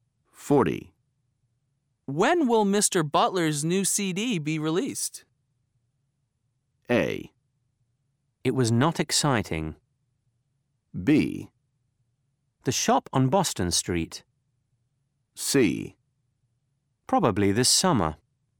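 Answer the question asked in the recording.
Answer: C: Probably this summer.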